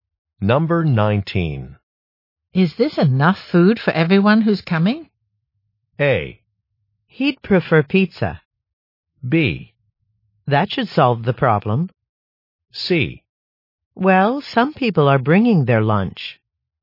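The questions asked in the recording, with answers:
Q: Is this enough food for everyone who's coming?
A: C: Well, some people are bringing their lunch.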